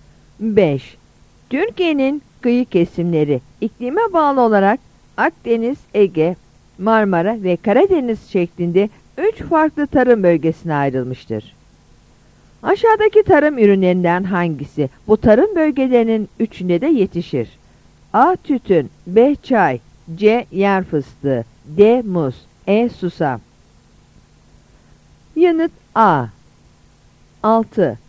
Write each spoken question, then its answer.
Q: Aşağıdaki tarım ürünlerinden hangisi bu tarım bölgelerinin üçünde de yetişir?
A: Yanıt A.